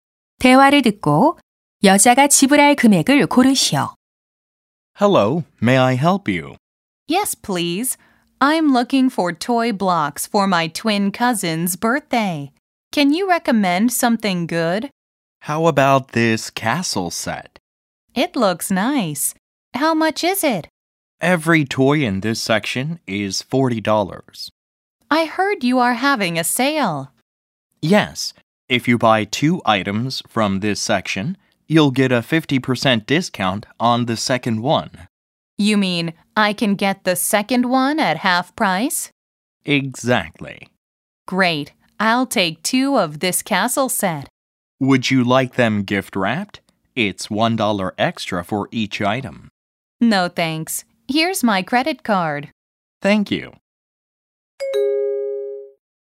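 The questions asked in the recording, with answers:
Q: 대화를 듣고 여자가 지불할 금액을 고르시오.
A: $60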